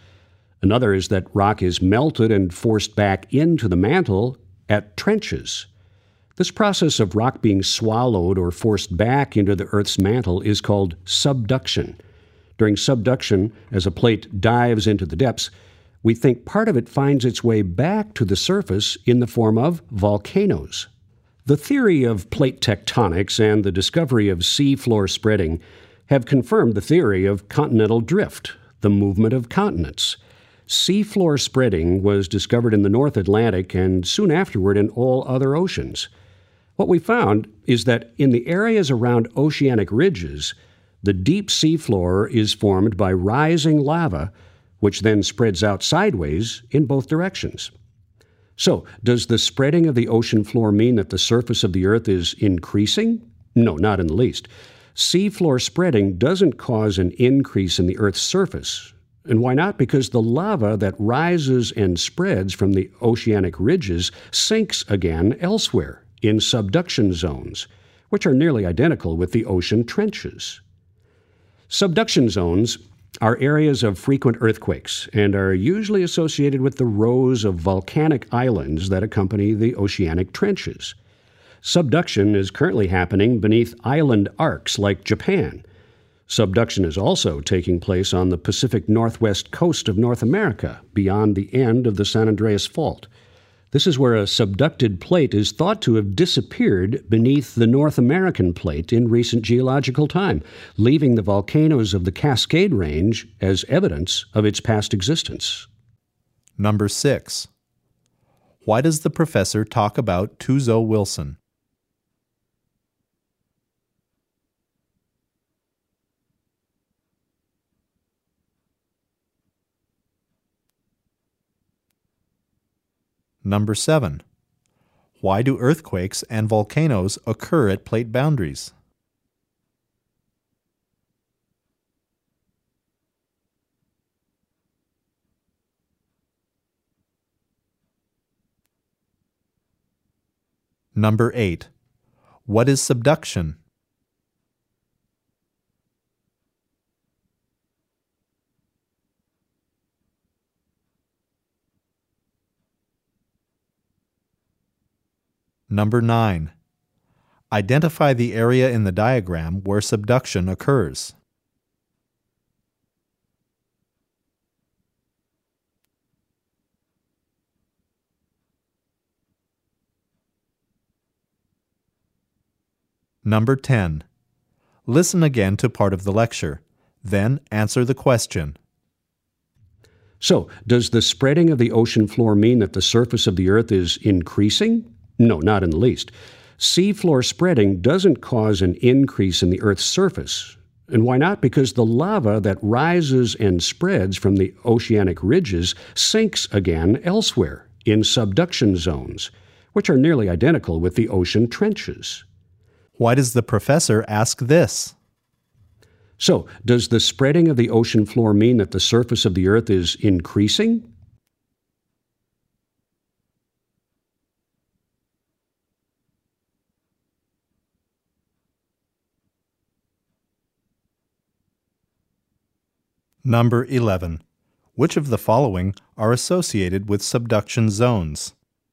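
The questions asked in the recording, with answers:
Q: What is subduction?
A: The process of rock being swallowed or forced back into the Earth's mantle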